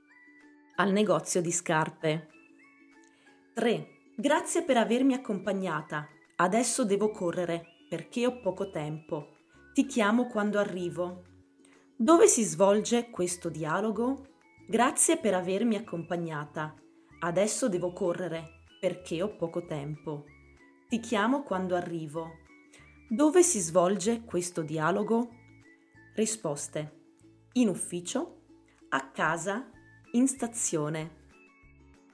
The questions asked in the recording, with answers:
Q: Dove si svolge questo dialogo?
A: In stazione.